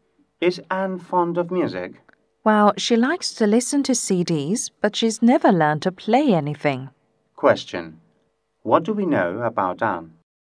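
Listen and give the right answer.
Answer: She likes listening to CDs but has never learned to play an instrument.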